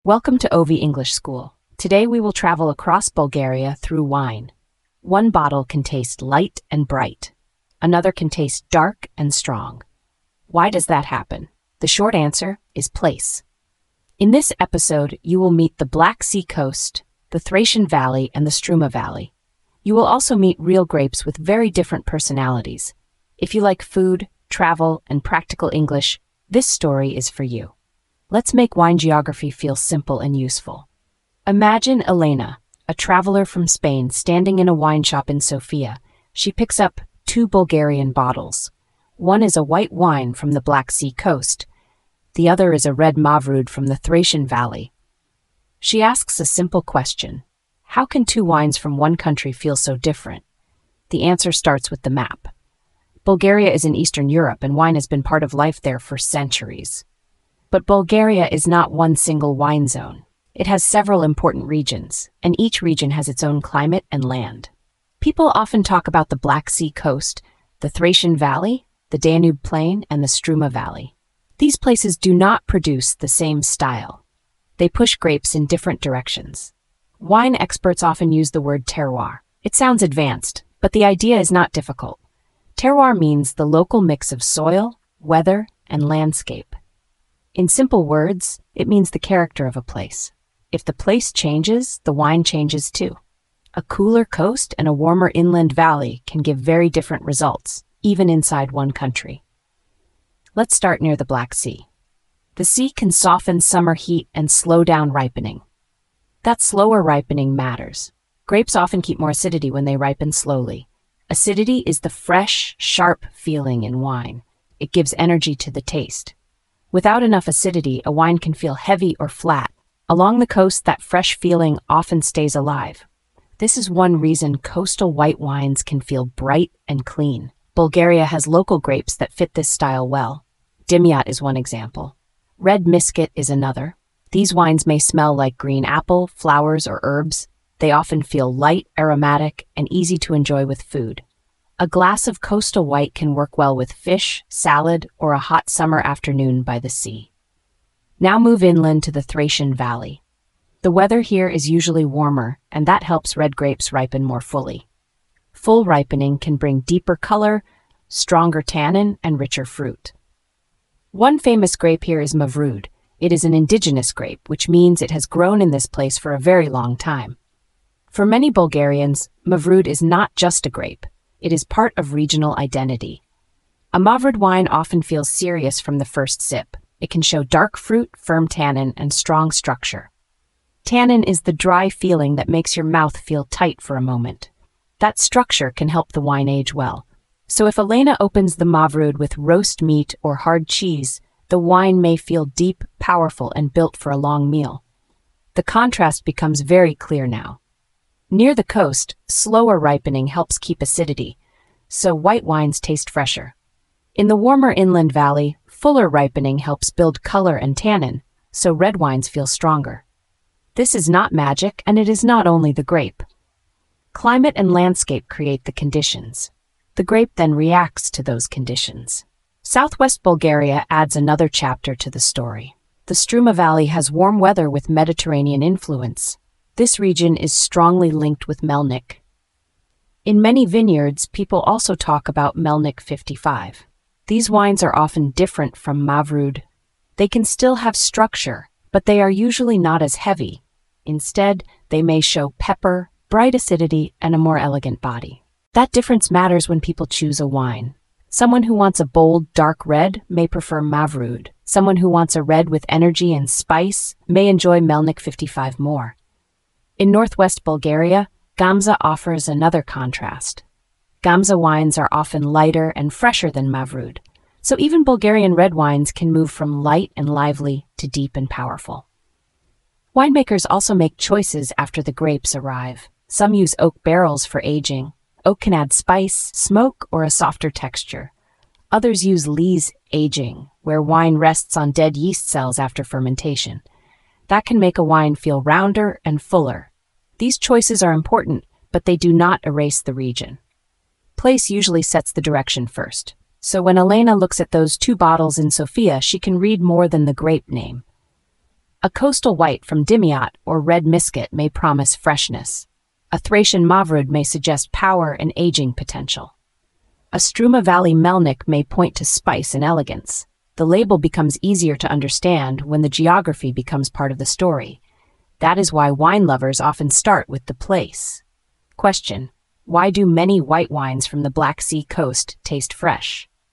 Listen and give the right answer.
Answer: because the sea softens heat and slows ripening, so the grapes keep more acidity.